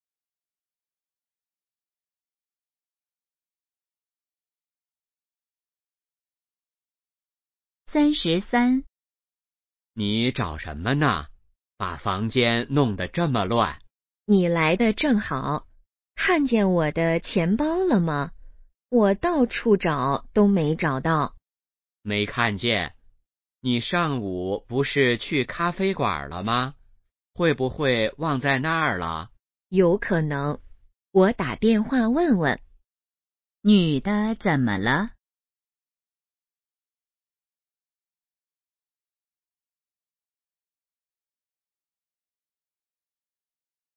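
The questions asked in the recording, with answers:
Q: 女的怎么了?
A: 钱包找不到了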